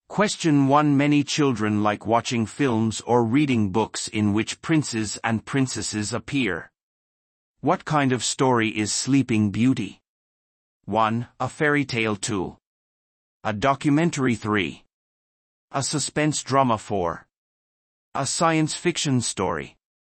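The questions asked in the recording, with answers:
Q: What kind of story is Sleeping Beauty?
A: 1: A fairy tale.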